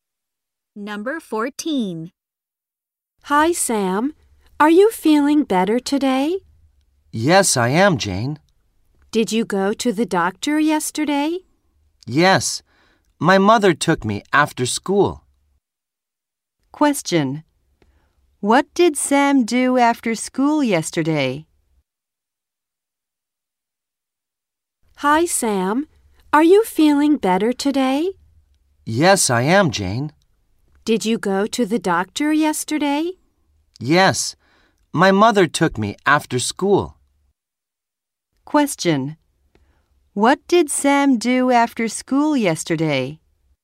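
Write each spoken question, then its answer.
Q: Question.What did Sam do after school yesterday?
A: He went to the doctor.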